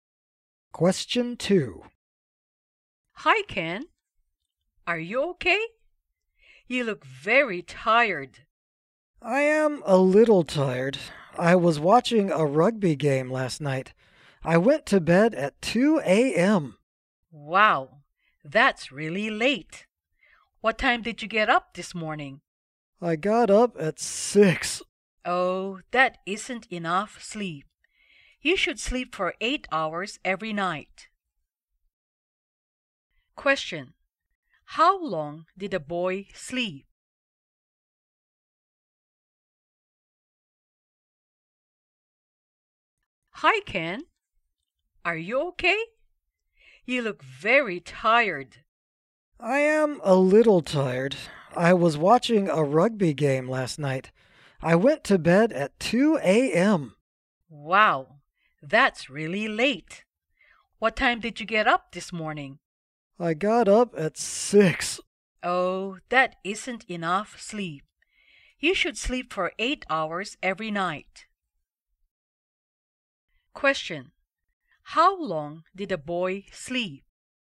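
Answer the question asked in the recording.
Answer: 4 hours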